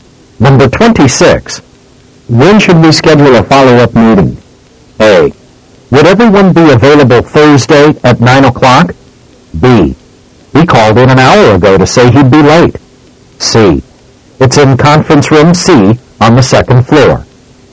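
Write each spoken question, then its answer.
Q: When should we schedule a follow-up meeting?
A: A: Would everyone be available Thursday at 9 o'clock?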